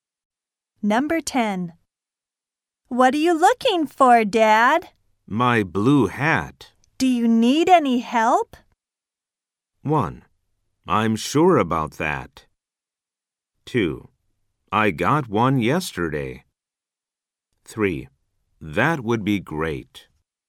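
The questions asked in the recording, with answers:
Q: Do you need any help?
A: 3: That would be great.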